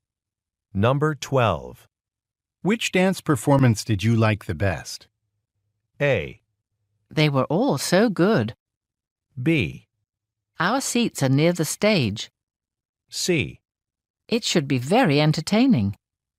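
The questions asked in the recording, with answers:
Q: Which dance performance did you like the best?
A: A: They were all so good.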